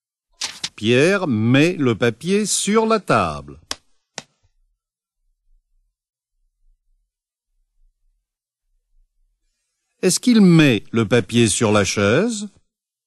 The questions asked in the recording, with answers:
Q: Est-ce qu'il met le papier sur la chaise?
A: Non, il ne met pas le papier sur la chaise.